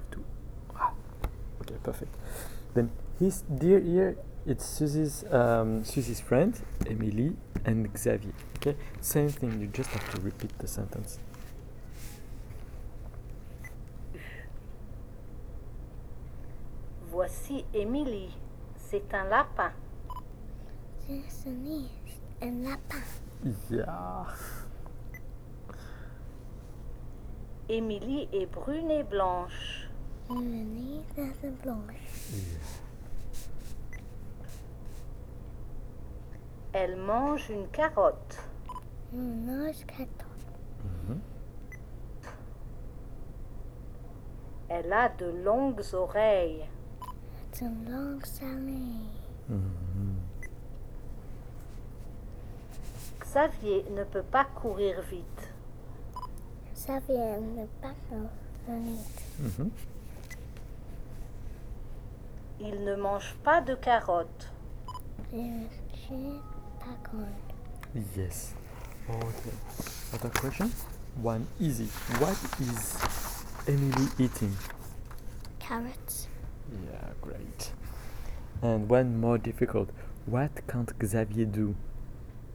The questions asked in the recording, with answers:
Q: What can't Xavier do?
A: he can't run very fast.